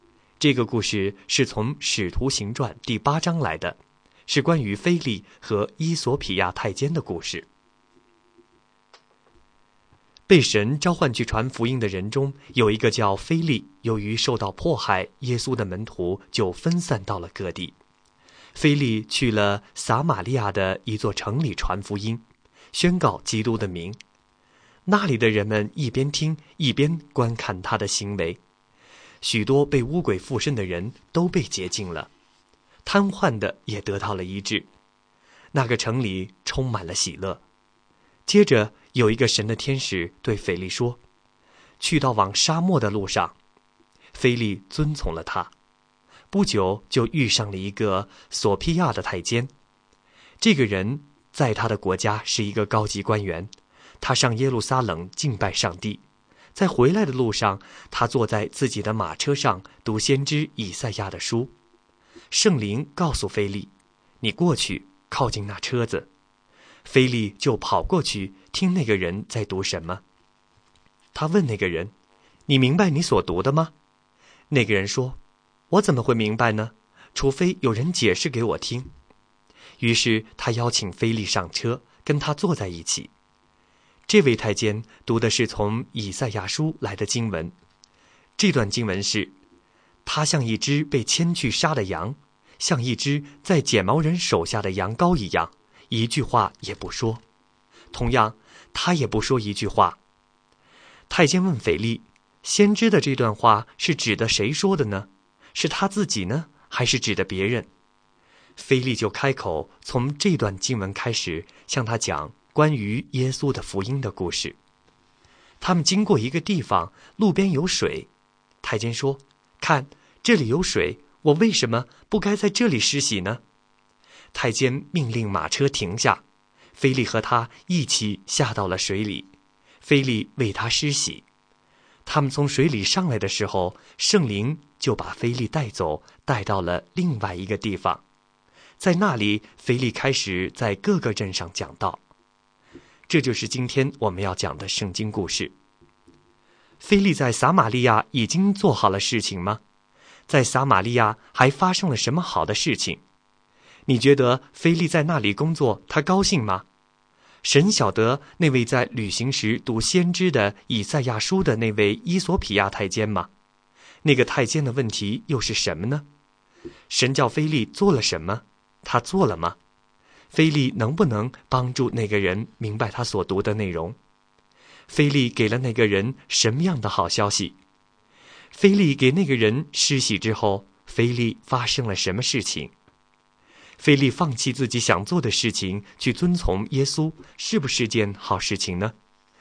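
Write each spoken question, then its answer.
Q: 在撒玛利亚还发生了什么好的事情?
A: 许多被污鬼附身的人被洁净,瘫痪的得到医治,城里充满喜乐

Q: 那个太监的问题又是什么呢?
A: 先知的这段话是指谁说的,是他自己还是别人

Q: 神叫腓力做了什么?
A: 去往沙漠的路上,靠近那辆车子

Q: 腓力给了那个人什么样的好消息?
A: 关于耶稣的福音

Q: 腓力给那个人施洗之后,腓力发生了什么事情?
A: 圣灵把他带到另外一个地方,他在各个镇上讲道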